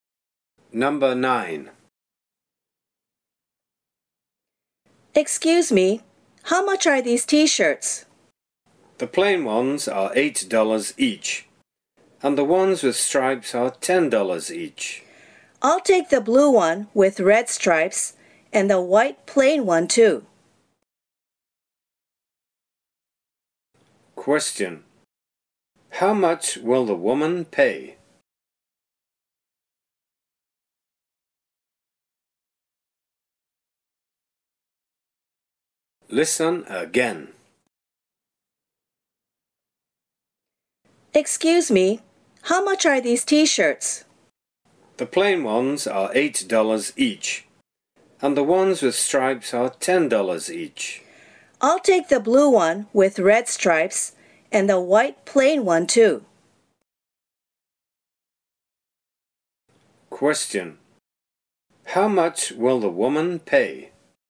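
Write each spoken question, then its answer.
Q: How much will the woman pay?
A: $18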